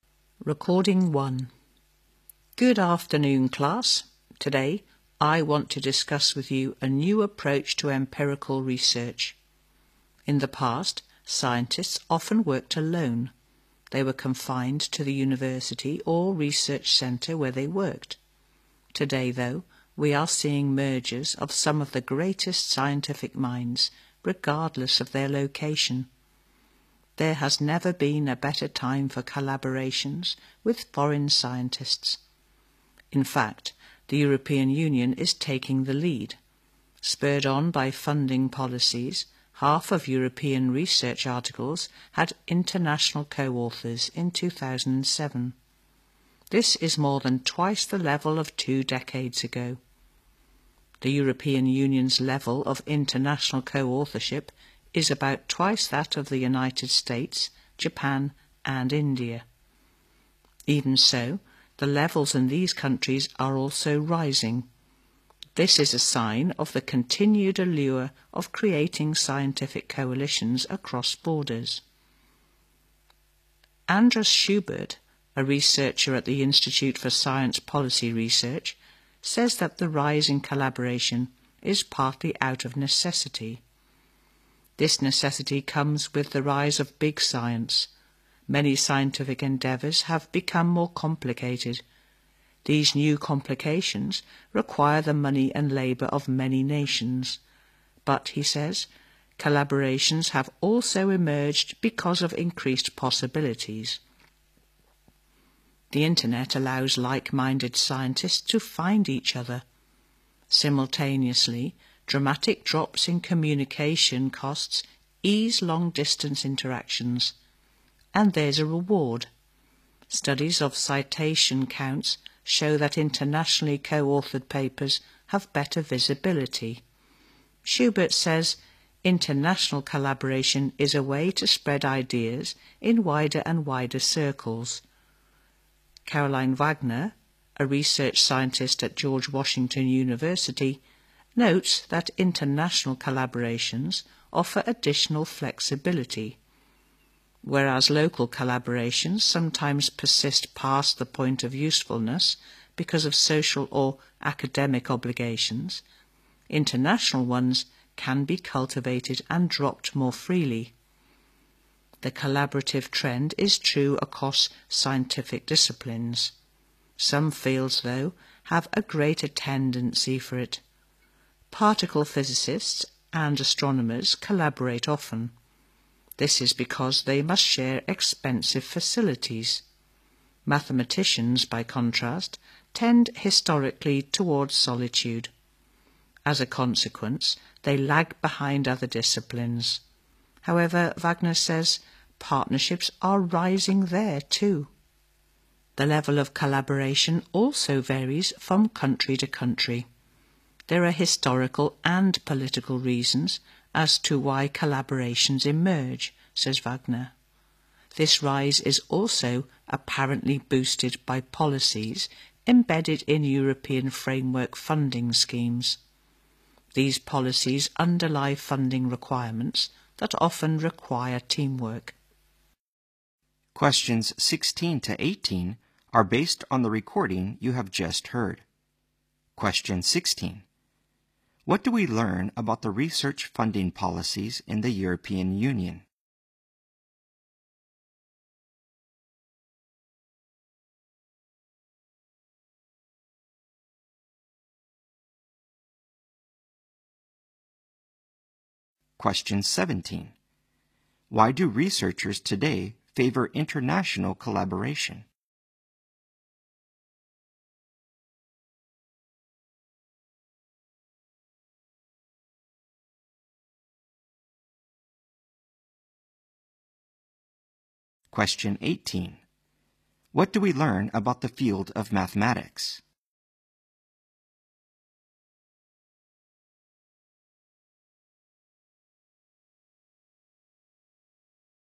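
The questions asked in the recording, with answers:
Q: What do we learn about the research funding policies in the European Union?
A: They often require teamwork, boosting international collaboration

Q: What do we learn about the field of mathematics?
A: It lags behind other fields in collaboration, though partnerships are rising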